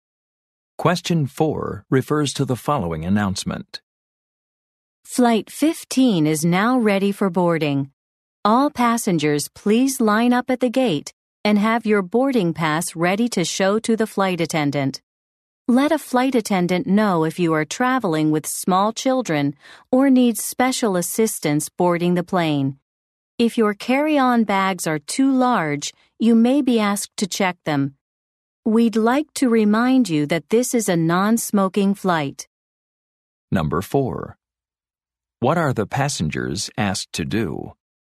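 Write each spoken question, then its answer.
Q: What are the passengers asked to do?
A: Line up at the gate with boarding passes ready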